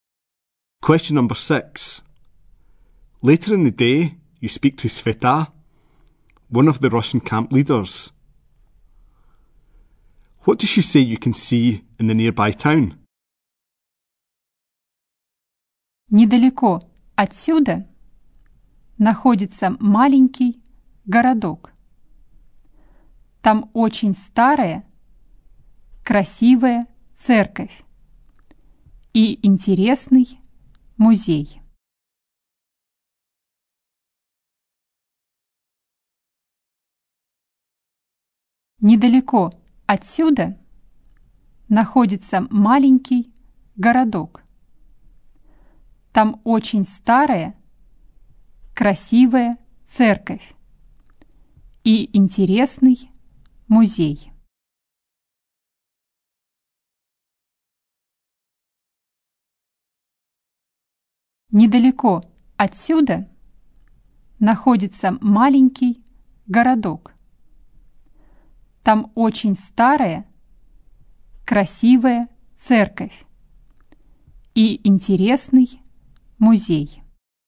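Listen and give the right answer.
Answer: A very old, beautiful church and an interesting museum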